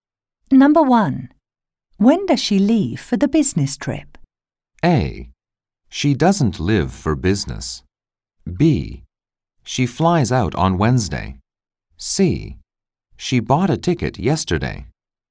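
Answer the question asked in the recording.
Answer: B: She flies out on Wednesday.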